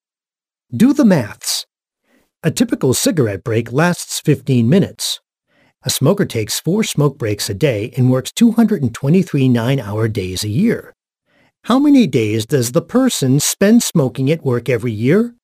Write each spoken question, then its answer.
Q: How many days does the person spend smoking at work every year?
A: The answer is nearly 25 days.